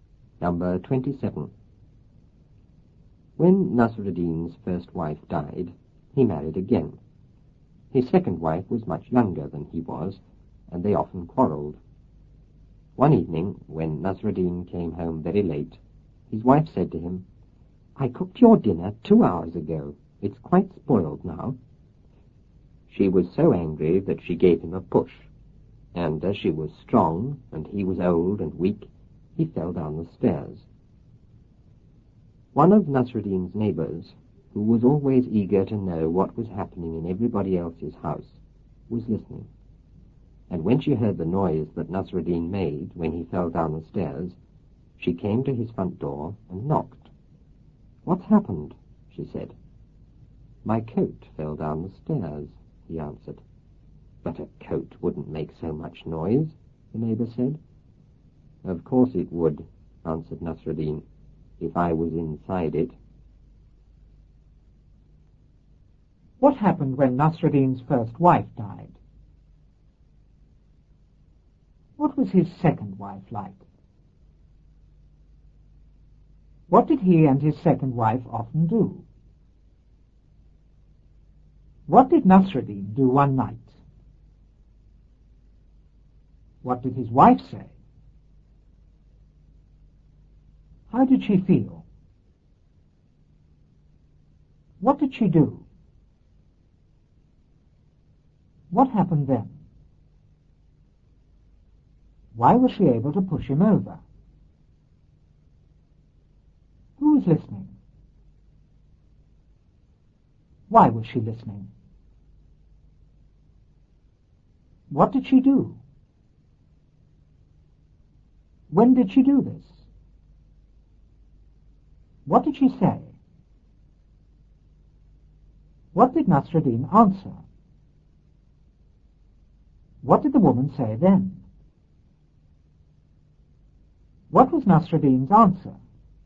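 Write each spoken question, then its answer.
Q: What happened when Nasruddin's first wife died?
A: He married again.

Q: What was his second wife like?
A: Much younger than he was, and strong.

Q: What did he and his second wife often do?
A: Quarrelled.

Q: What did Nasruddin do one night?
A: He came home very late.

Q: What did his wife say?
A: "I cooked your dinner 2 hours ago. It's quite spoiled now."

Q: How did she feel?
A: Angry.

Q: What did she do?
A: She gave him a push.

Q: What happened then?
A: He fell down the stairs.

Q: Why was she able to push him over?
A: She was strong and he was old and weak.

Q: Who was listening?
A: One of Nasruddin's neighbours.

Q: Why was she listening?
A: She was always eager to know what was happening in everybody else's house.

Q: What did she do?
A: She came to his front door and knocked.

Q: When did she do this?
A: When she heard the noise he made falling down the stairs.

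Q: What did she say?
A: "What's happened?"

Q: What did Nasruddin answer?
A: "My coat fell down the stairs."

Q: What did the woman say then?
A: "But a coat wouldn't make so much noise."

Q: What was Nasruddin's answer?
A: "Of course it would, if I was inside it."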